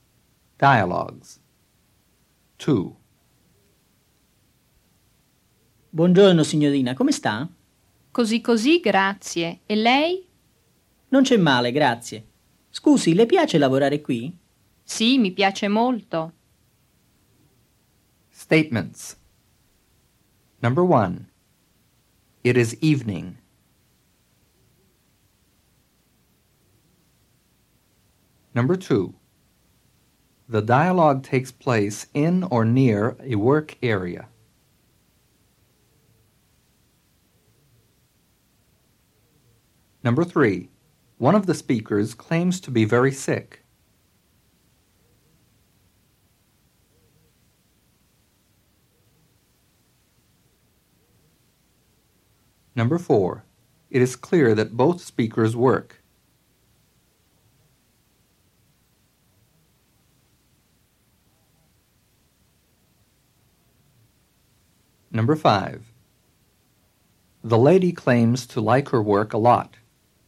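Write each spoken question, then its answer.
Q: It is evening.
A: False

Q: The dialogue takes place in or near a work area.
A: True

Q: One of the speakers claims to be very sick.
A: False

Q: The lady claims to like her work a lot.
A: True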